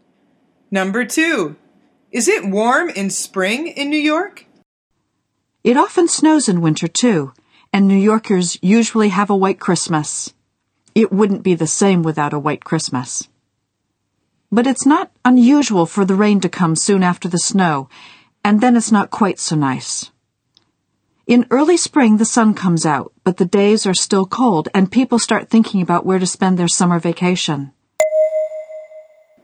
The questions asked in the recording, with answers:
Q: is it warm in spring in New York?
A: The answer is no. The woman says, in early spring, the sun comes out, but the days are still cold.